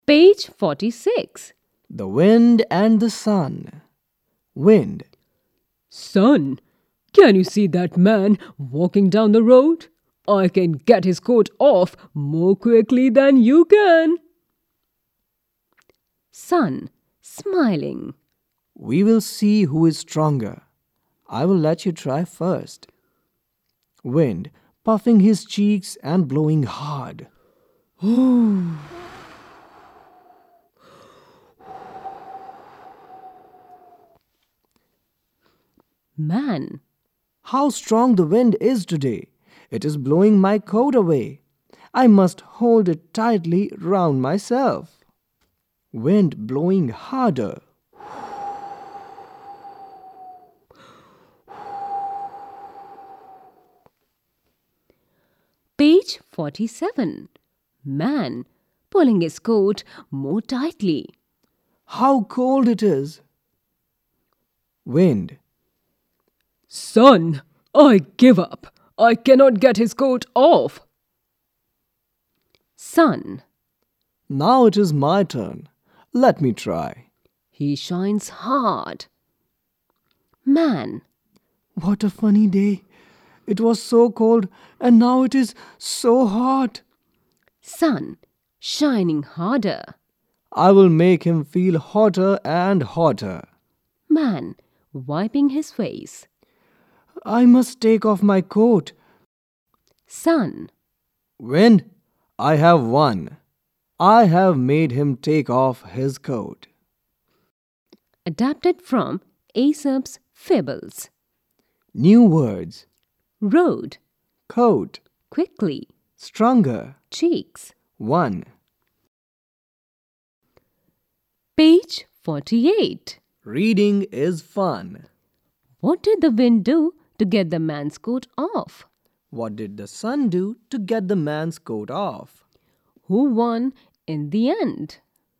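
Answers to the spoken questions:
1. He blew hard
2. He shone hard
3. The sun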